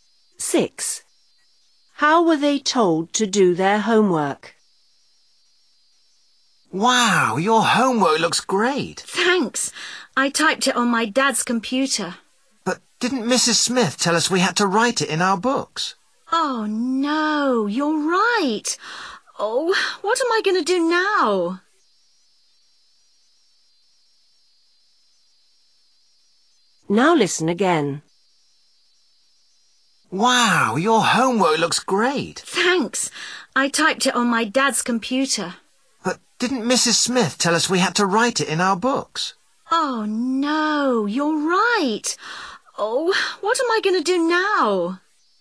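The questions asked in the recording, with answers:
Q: How were they told to do their homework?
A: Write it in their books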